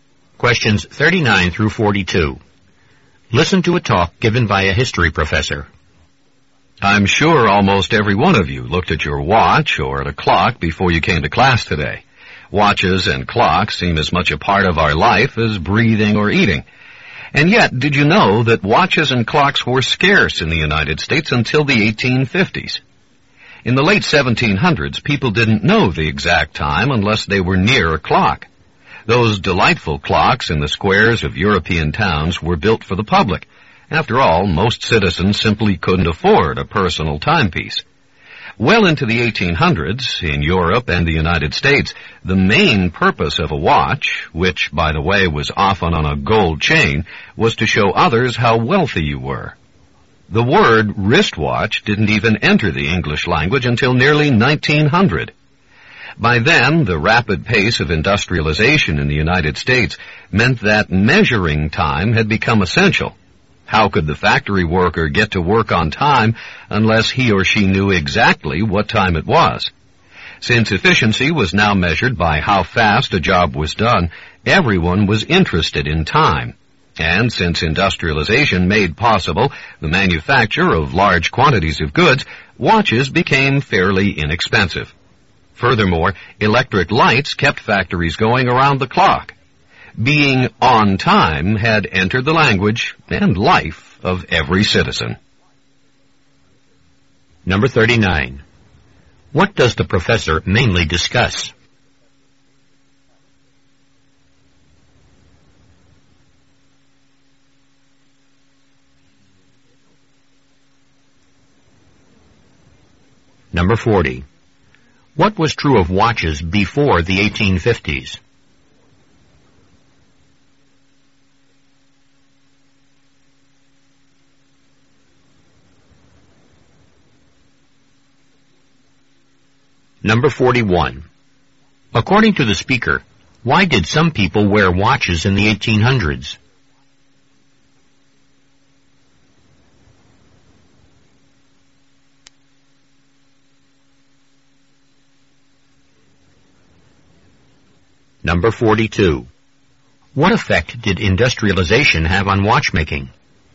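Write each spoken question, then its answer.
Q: What does the professor mainly discuss?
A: How watches and clocks became common in the United States

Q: What was true of watches before the 1850s?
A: They were scarce

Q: According to the speaker, why did some people wear watches in the 1800s?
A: To show others how wealthy they were

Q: What effect did industrialization have on watchmaking?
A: Watches could be made in large quantities and became fairly inexpensive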